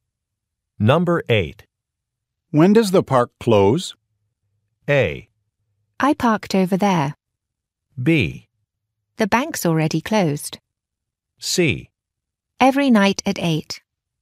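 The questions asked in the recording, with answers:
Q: When does the park close?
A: C: Every night at 8.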